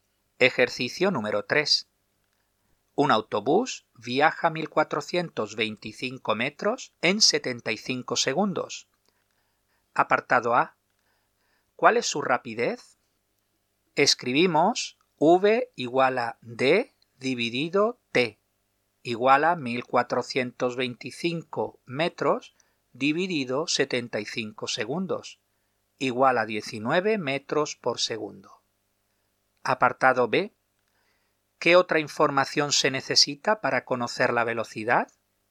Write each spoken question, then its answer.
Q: Apartado A. ¿Cuál es su rapidez?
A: Escribimos v igual a d dividido t igual a 1425 metros dividido 75 segundos igual a 19 metros por segundo.